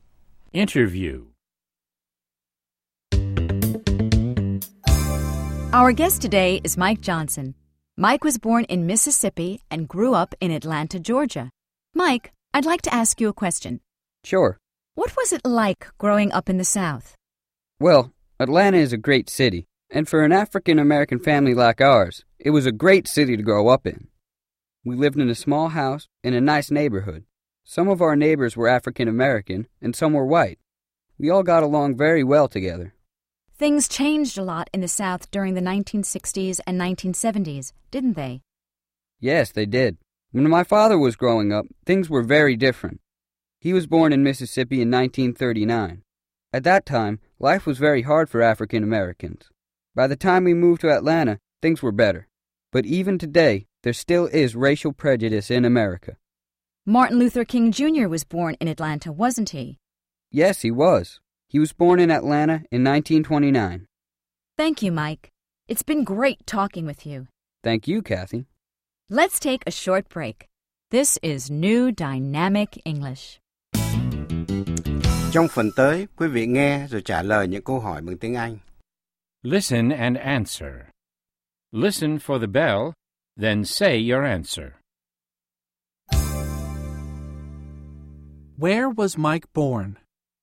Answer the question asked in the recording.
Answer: He was born in Mississippi.